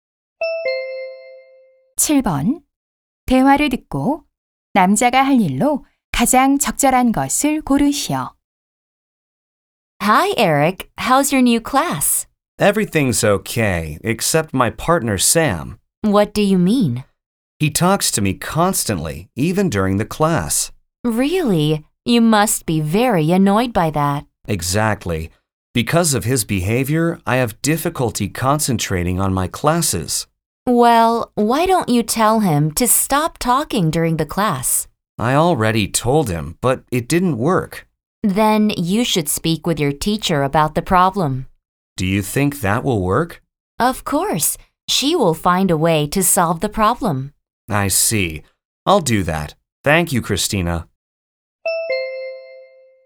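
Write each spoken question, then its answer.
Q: 대화를 듣고 남자가 할 일로 가장 적절한 것을 고르시오.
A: 선생님께 짝의 문제에 대해 말씀드리기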